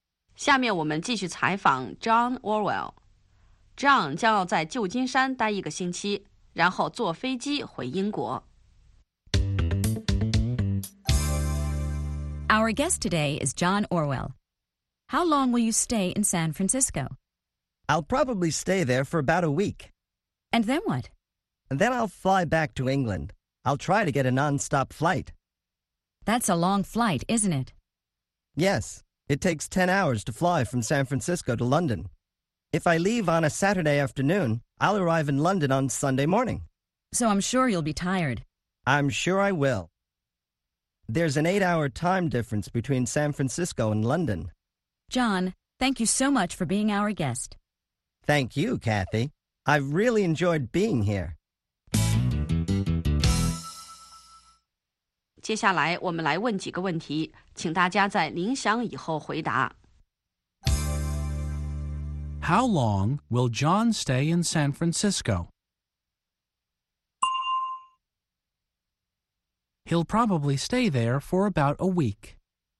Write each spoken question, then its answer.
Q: How long will John stay in San Francisco?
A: He'll probably stay there for about a week.